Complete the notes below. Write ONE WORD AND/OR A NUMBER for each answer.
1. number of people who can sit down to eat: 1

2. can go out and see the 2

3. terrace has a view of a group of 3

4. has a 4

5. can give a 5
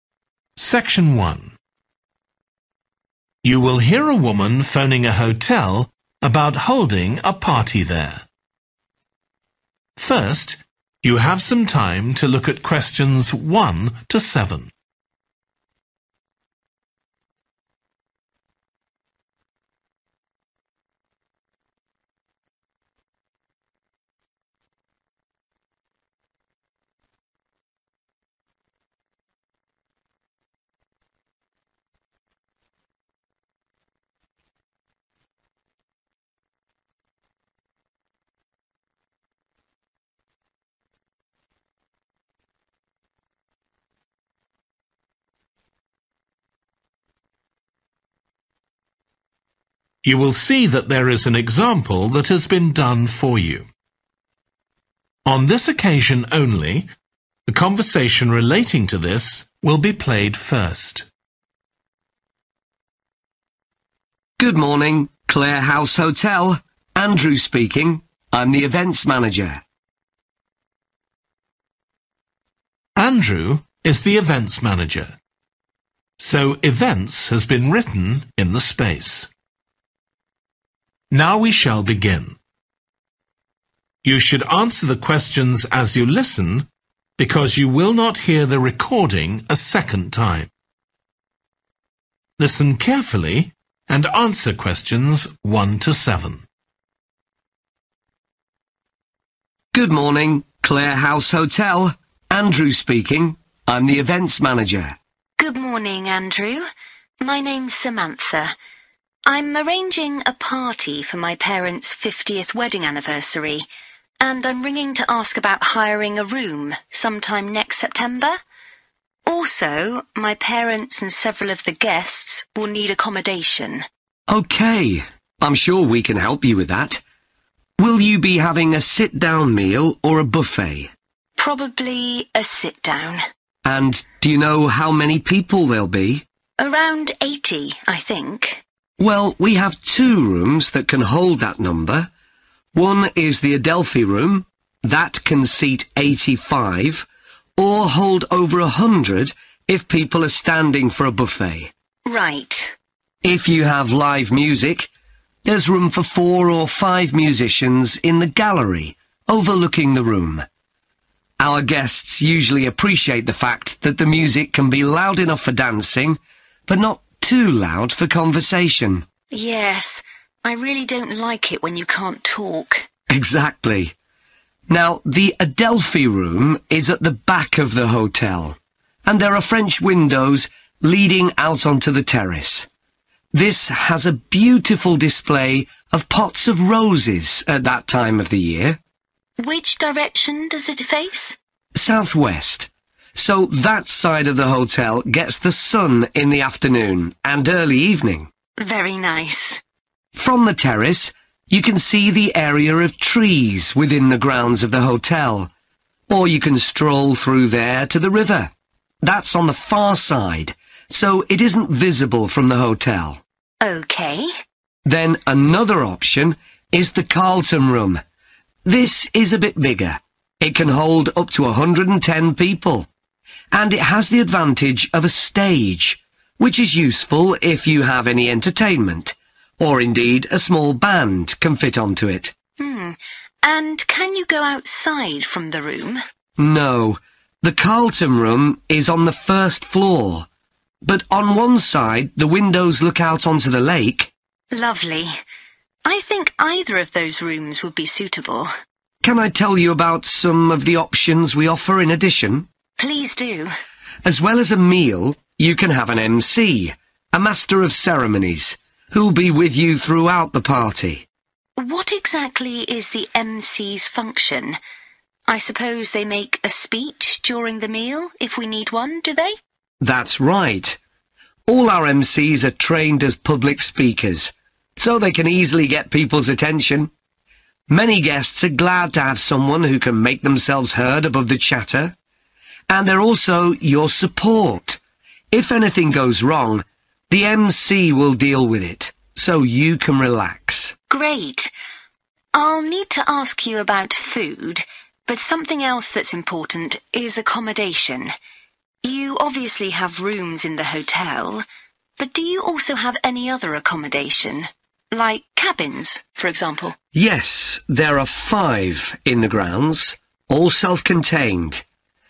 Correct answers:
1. 85
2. roses
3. trees
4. stage
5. speech

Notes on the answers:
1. That can seat eighty-five [Phòng có thể chứa được 85 người], or hold over a hundred if people are standing for a buffet.
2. and there are French windows leading out onto the terrace. This has a beautiful display of pots of roses [có cửa sổ kiểu Pháp dẫn ra sân hiên. Ở đây có trưng bày các chậu hoa hồng tuyệt đẹp] at that time of the year .
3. From the terrace you can see (= terrace has a view of) the area of trees [Từ sân thượng bạn có thể nhìn thấy không gian cây xanh] within the grounds of the hotel, or you can stroll through there to the river – that's on the far side, so it isn't visible from the hotel.
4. and it has the advantage of a stage [và nó có lợi thế là có một sân khấu], which is useful if you have any entertainment, or indeed a small band can fit onto it.